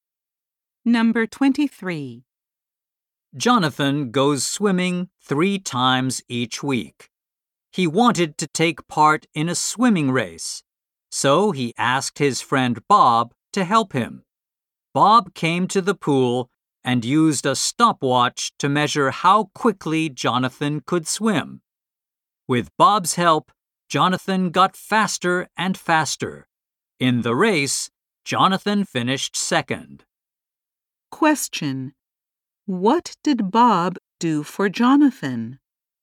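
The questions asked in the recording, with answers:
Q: What did Bob do for Jonathan?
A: He measured how quickly Jonathan could swim with a stopwatch.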